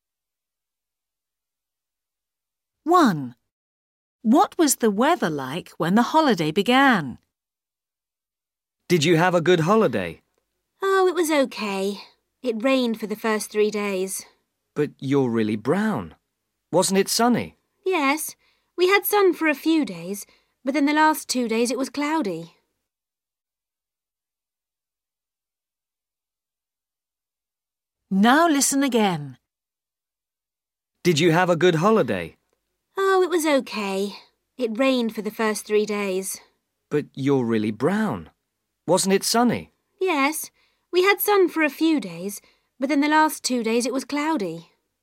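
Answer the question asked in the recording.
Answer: It was rainy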